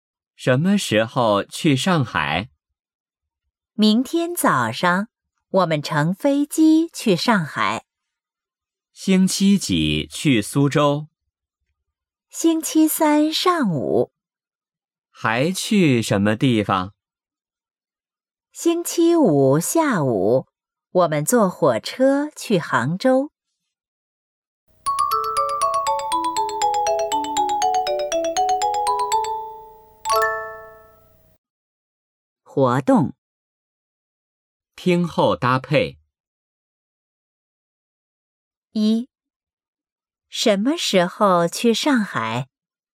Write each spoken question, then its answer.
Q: 什么时候去上海?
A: 明天早上。